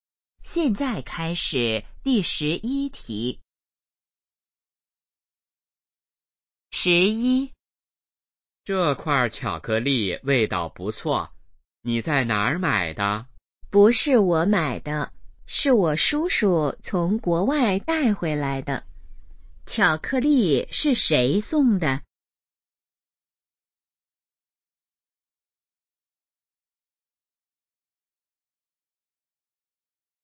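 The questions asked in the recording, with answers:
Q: 巧克力是谁送的?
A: 叔叔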